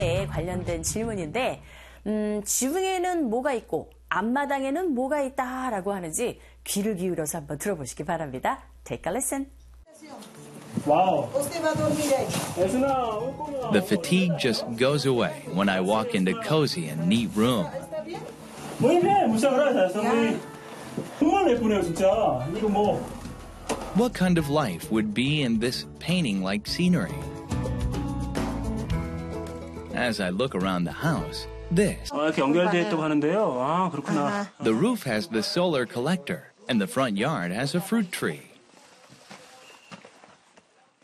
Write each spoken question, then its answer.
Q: 관련된 질문인데, 지붕에는 뭐가 있고 앞마당에는 뭐가 있다라고 하는지 귀를 기울여서 한번 들어보시기 바랍니다.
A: 지붕 위에는 태양열 지벽이가 있고 앞마당에는 과일나무 하나가 있다.